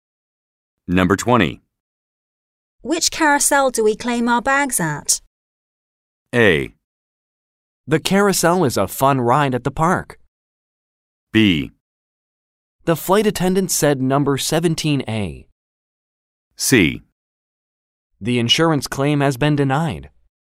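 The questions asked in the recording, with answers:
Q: Which carousel do we claim our bags at?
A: B: The flight attendant said number 17A.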